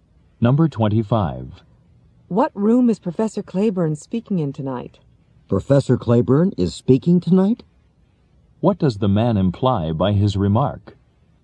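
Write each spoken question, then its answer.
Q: What does the man imply by his remark?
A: He didn't know Professor Claiborne was speaking tonight.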